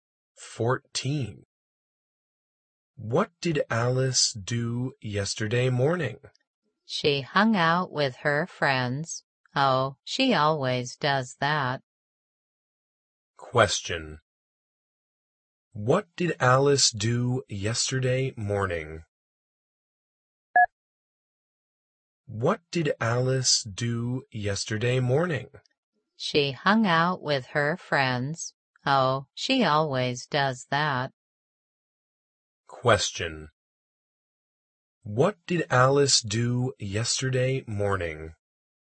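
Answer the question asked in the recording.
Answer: She hung out with her friends.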